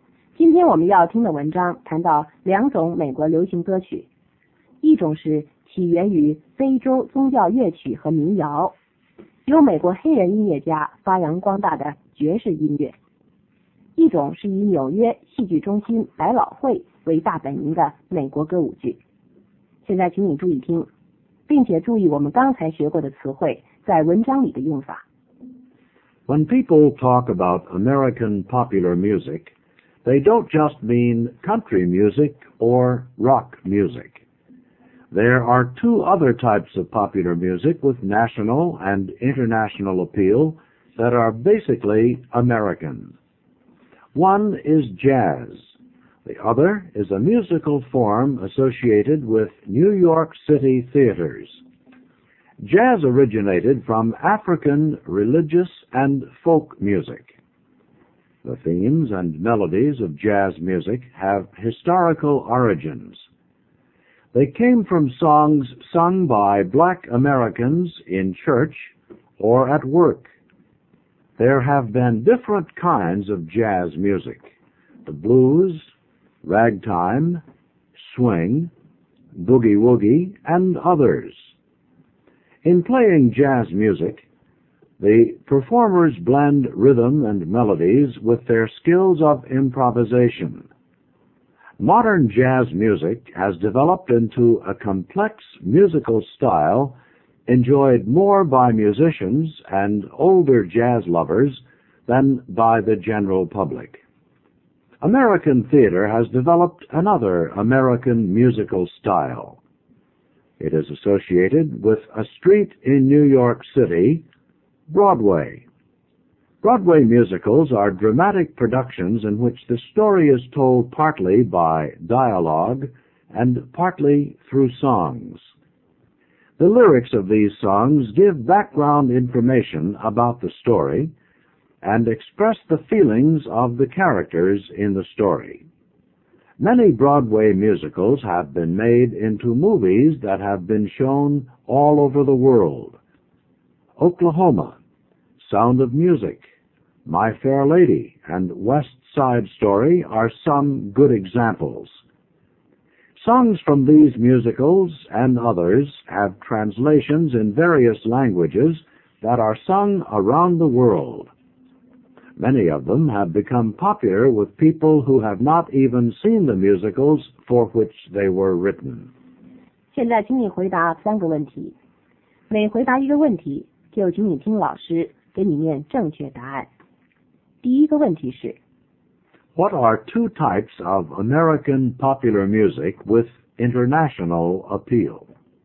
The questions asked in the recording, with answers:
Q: What are two types of American popular music with international appeal?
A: They are jazz and Broadway musicals.